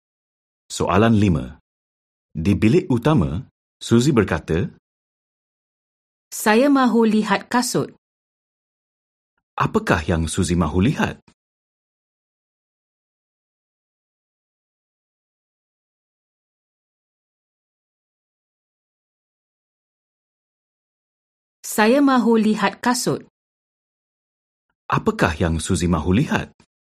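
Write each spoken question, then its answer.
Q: Apakah yang Suzy mahu lihat?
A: Kasut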